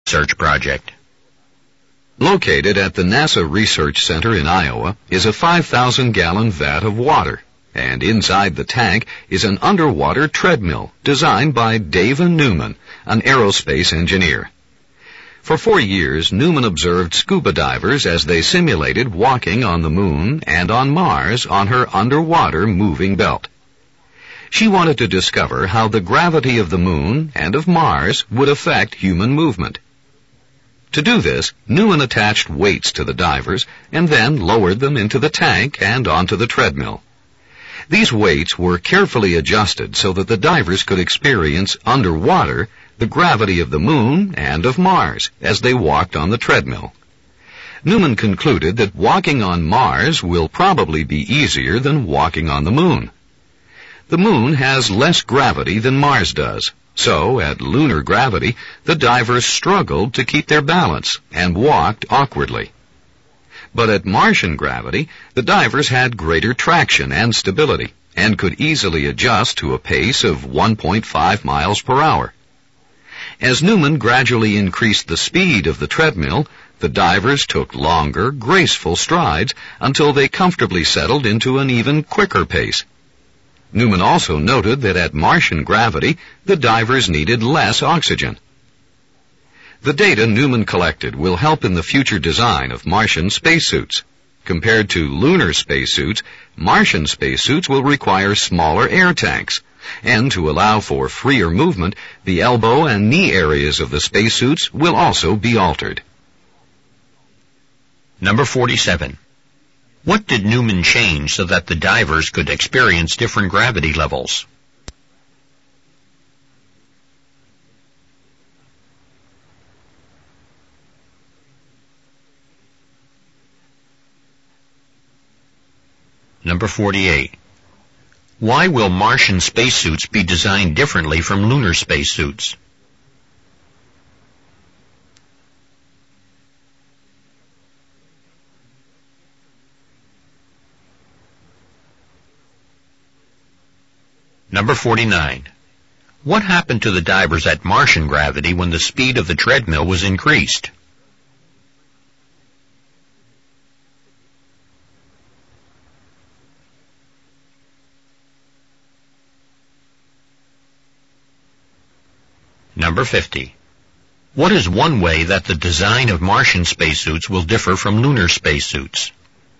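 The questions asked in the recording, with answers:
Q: What did Newman change so that the divers could experience different gravity levels?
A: The weights attached to the divers

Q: What happened to the divers at Martian gravity when the speed of the treadmill was increased?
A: They took longer, graceful strides and settled into a quicker pace

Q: What is one way that the design of Martian spacesuits will differ from lunar spacesuits?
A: Smaller air tanks (or altered elbow and knee areas)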